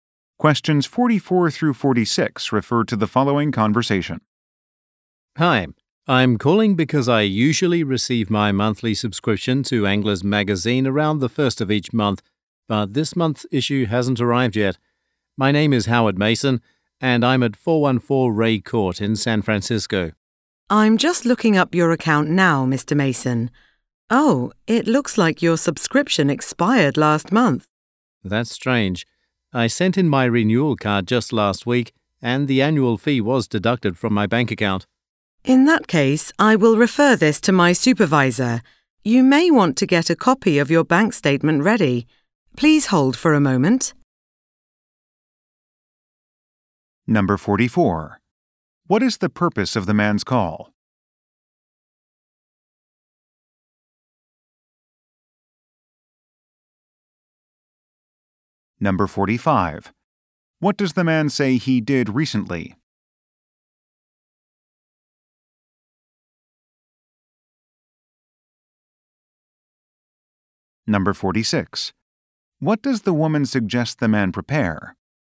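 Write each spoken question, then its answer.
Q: What is the purpose of the man's call?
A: His magazine issue has not arrived

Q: What does the man say he did recently?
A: Sent in his renewal card

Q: What does the woman suggest the man prepare?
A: A copy of his bank statement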